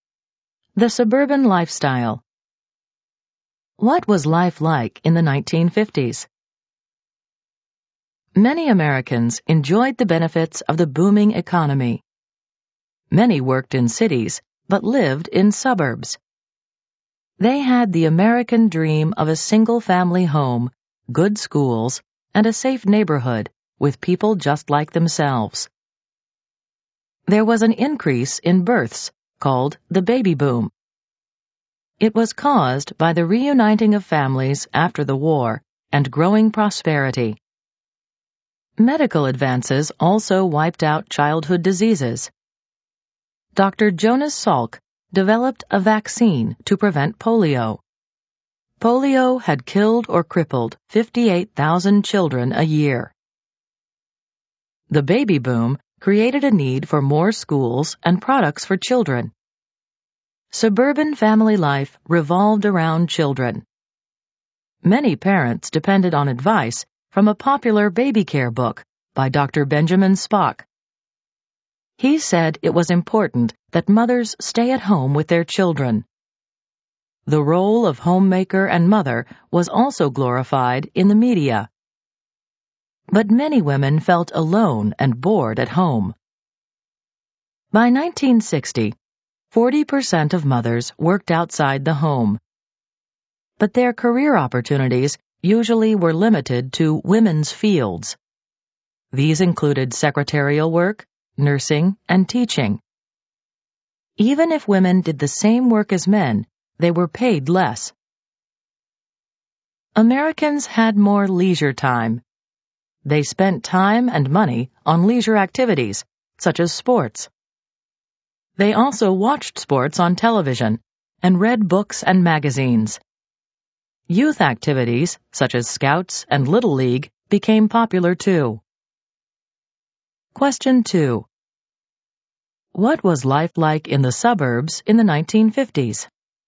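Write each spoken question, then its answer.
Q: What was life like in the suburbs in the 1950s?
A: Families lived in single-family homes with good schools. Family life centred on children during the baby boom, and mothers were expected to stay home. People had more leisure time for sports, TV and youth activities.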